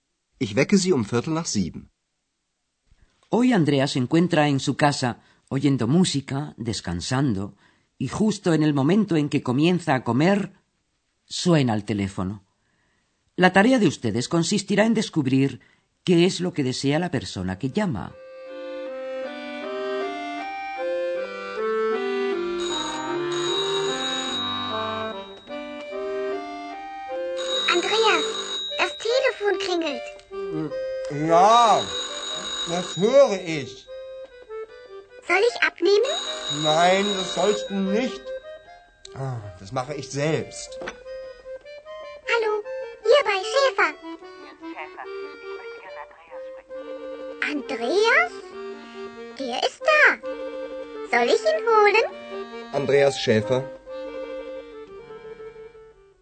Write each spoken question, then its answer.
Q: La tarea de ustedes consistirá en descubrir qué es lo que desea la persona que llama.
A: La persona que llama desea hablar con Andreas.